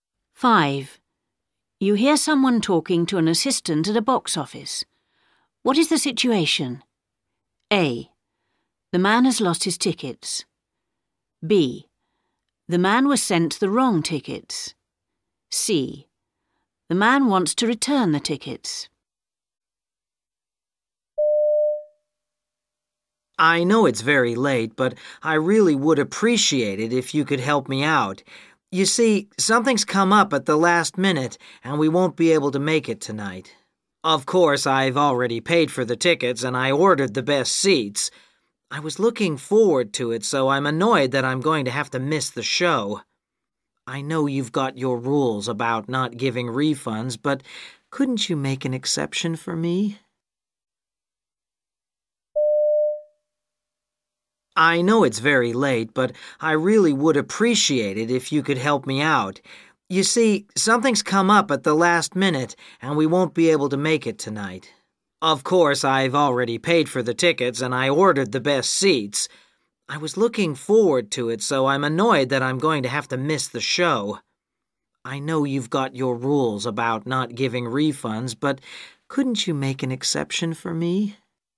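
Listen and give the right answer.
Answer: C: The man wants to return the tickets.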